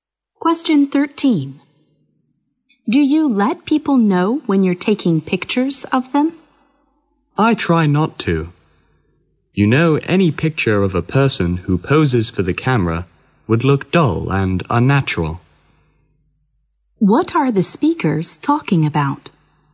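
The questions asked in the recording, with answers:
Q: What are the speakers talking about?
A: Taking pictures of people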